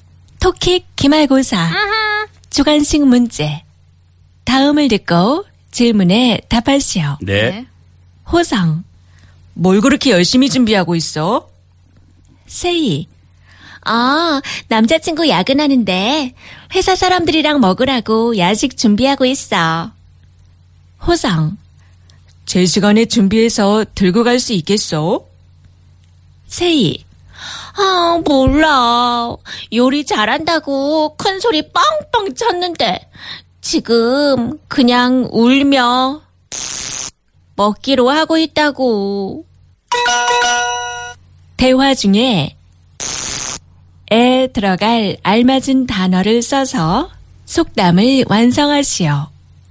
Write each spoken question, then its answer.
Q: 대화 중에 에 들어갈 알맞은 단어를 써서 속담을 완성하시오.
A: It's 교자.